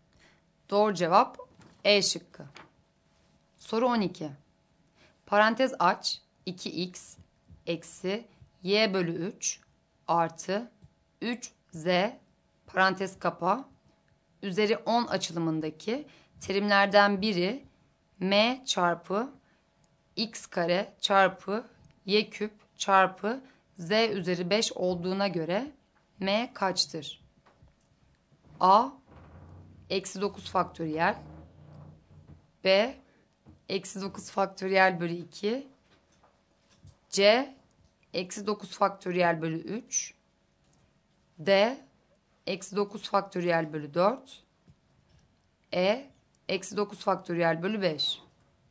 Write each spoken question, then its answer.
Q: Parantez aç 2x eksi y bölü 3 artı 3z parantez kapa üzeri 10 açılımındaki terimlerden biri m çarpı x kare çarpı y küp çarpı z üzeri 5 olduğuna göre m kaçtır?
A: Doğru cevap D şıkkı.